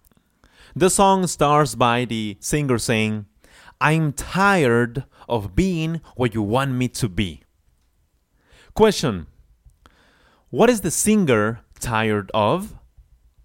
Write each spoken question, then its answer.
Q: What is the singer tired of?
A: Of course, he's tired of being what somebody wants him to be.